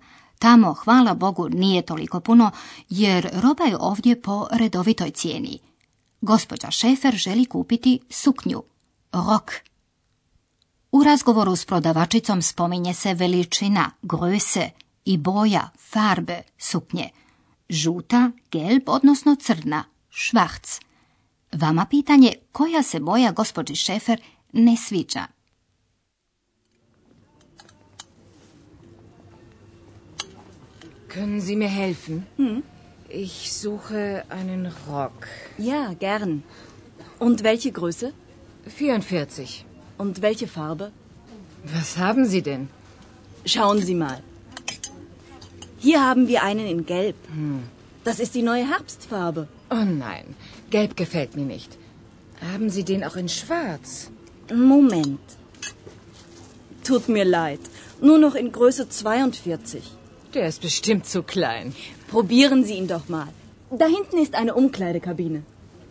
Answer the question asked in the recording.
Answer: Da, ne sviđa joj se žuta.